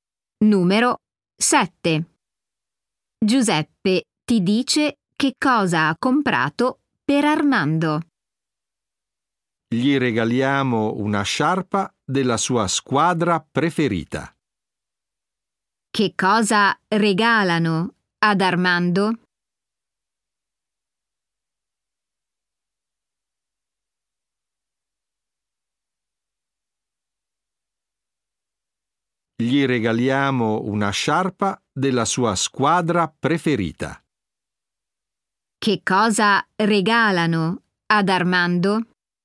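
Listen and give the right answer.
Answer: Una sciarpa della sua squadra preferita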